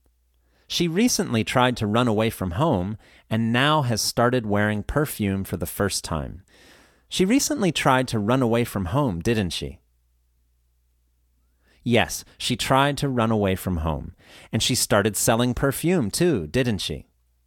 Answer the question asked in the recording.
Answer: No, that's not correct. She started wearing perfume, not selling it.